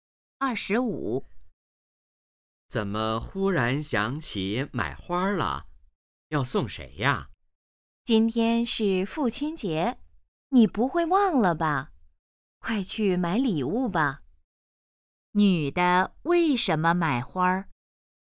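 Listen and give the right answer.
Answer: 今天是父亲节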